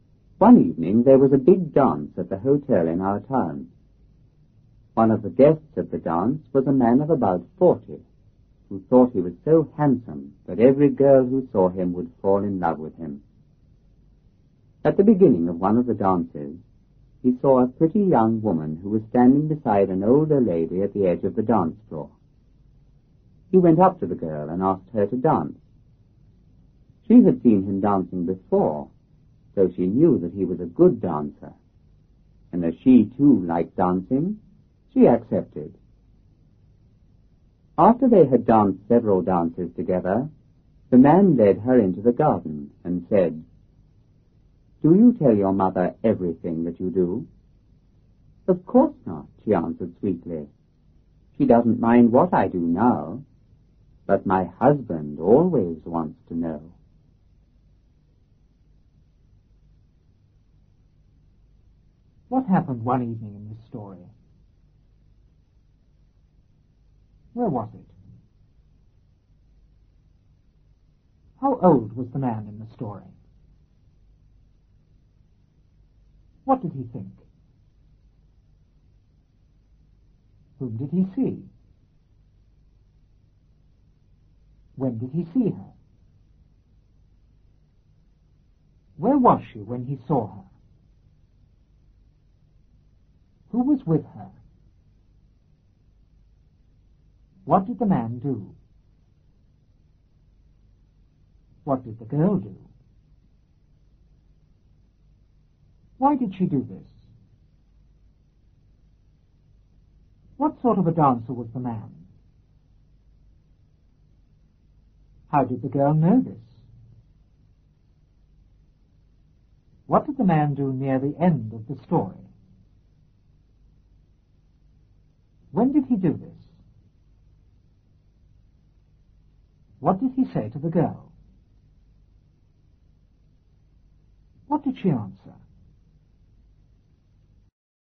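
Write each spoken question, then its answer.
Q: What happened one evening in this story?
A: There was a big dance at the hotel in town.

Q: Where was it?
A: At the hotel in the town.

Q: How old was the man in the story?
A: About 40.

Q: What did he think?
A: That he was so handsome every girl who saw him would fall in love with him.

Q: Whom did he see?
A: A pretty young woman.

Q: When did he see her?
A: At the beginning of one of the dances.

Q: Where was she when he saw her?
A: At the edge of the dance floor.

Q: Who was with her?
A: An older lady.

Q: What did the man do?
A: He went up to the girl and asked her to dance.

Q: What did the girl do?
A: She accepted.

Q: Why did she do this?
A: She knew he was a good dancer and she liked dancing too.

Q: What sort of a dancer was the man?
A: A good dancer.

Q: How did the girl know this?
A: She had seen him dancing before.

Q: What did the man do near the end of the story?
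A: He led her into the garden.

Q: When did he do this?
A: After they had danced several dances together.

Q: What did he say to the girl? What did she answer?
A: He asked if she told her mother everything she did; she said her mother didn't mind but her husband always wanted to know.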